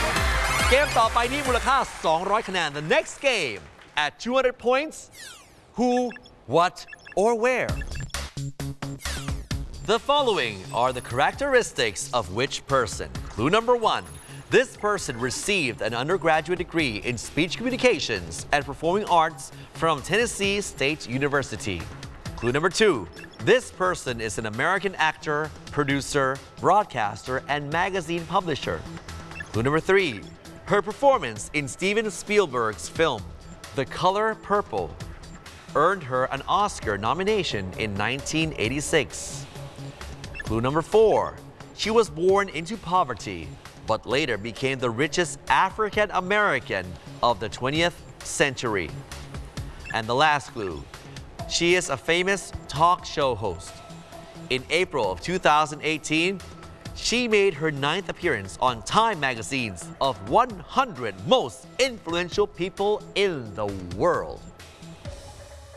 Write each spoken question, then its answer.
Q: The following are the characteristics of which person?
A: The answer we're looking for is Oprah Winfrey